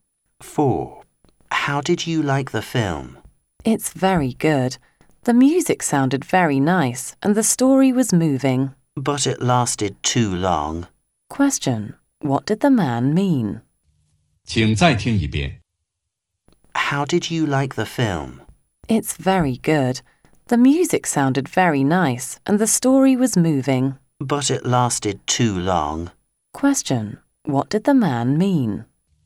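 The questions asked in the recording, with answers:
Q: What did the man mean?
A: The film was good but too long.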